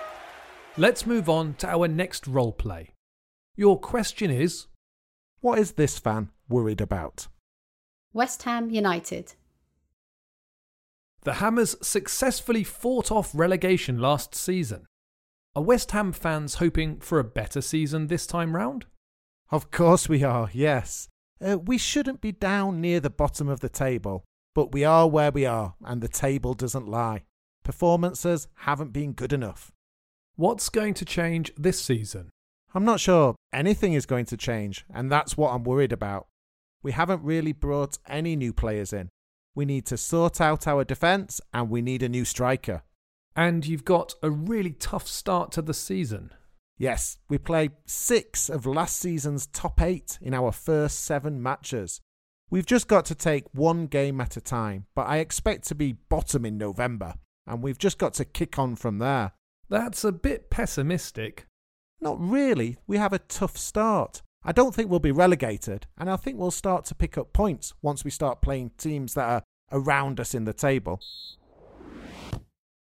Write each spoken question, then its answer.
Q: What is this fan worried about?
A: He's worried about the lack of transfer business and the difficult matches West Ham have at the start of the season.